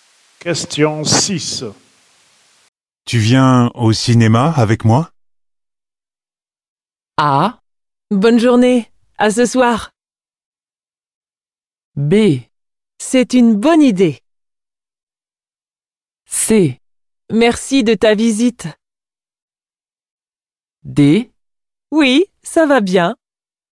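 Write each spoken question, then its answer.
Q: Tu viens au cinéma avec moi?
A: B: C'est une bonne idée.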